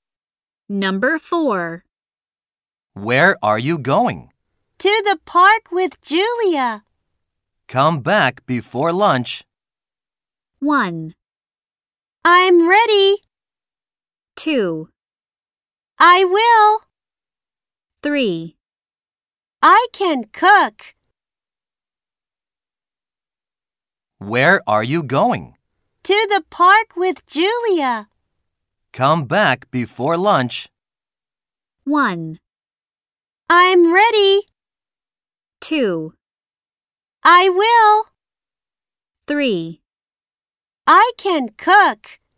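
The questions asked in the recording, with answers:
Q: Come back before lunch.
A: 2: I will.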